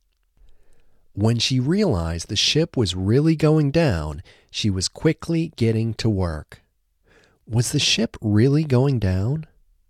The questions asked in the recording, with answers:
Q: Was the ship really going down?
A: Yes, the ship was really going down.